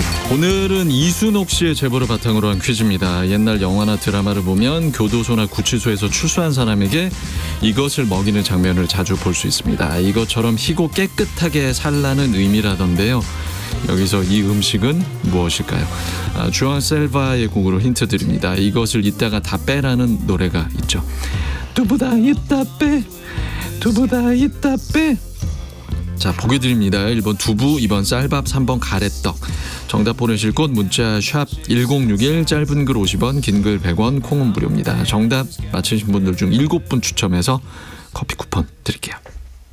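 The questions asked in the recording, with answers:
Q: 여기서 이 음식은 무엇일까요?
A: 1번: 두부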